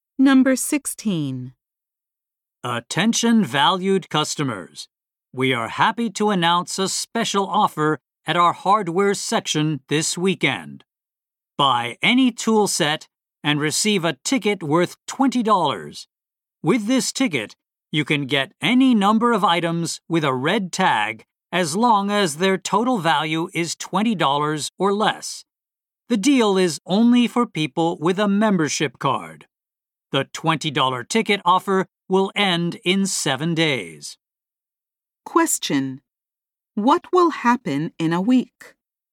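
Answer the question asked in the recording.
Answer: The $20 ticket offer will end.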